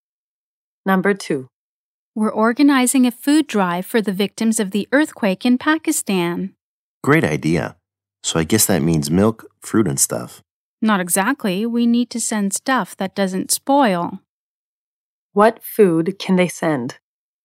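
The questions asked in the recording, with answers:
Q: What food can they send?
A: Food that doesn't spoil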